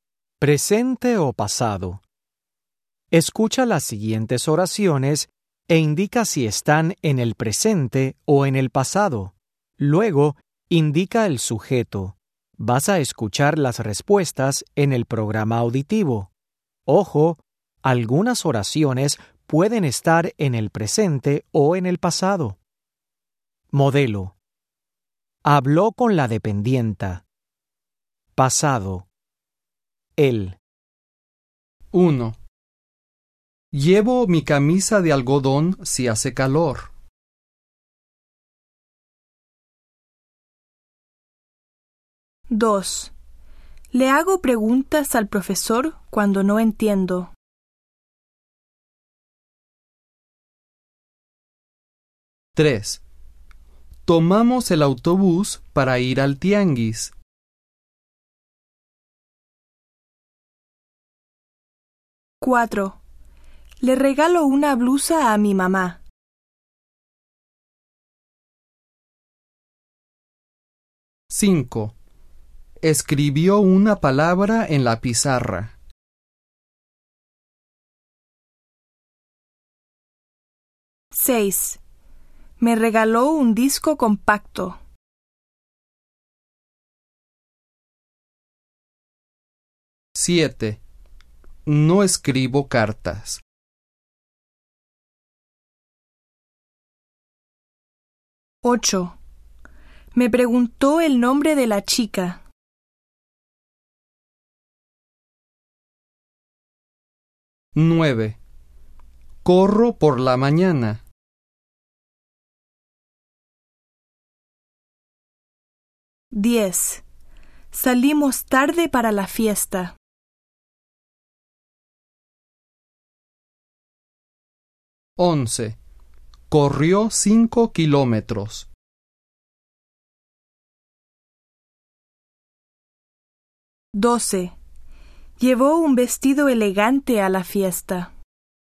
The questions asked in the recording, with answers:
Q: Llevo mi camisa de algodón si hace calor.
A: 1. Presente, yo.

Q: Le hago preguntas al profesor cuando no entiendo.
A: 2. Presente, yo.

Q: Tomamos el autobús para ir al tianguis.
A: 3. Presente o pasado, nosotros.

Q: Le regalo una blusa a mi mamá.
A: 4. Presente, yo.

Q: Escribió una palabra en la pizarra.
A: 5. Pasado, él.

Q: Me regaló un disco compacto.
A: 6. Pasado, usted.

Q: No escribo cartas.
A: 7. Presente, yo.

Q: Me preguntó el nombre de la chica.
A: 8. Pasado, ella.

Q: Corro por la mañana.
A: 9. Presente, yo.

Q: Salimos tarde para la fiesta.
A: 10. Presente o pasado, nosotros.

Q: Corrió 5 kilómetros.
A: 11. Pasado, él.

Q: Llevó un vestido elegante a la fiesta.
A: Pasado, ella.